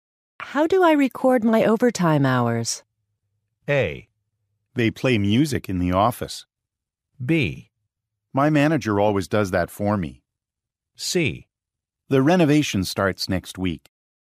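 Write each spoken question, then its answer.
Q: How do I record my overtime hours?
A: B: My manager always does that for me.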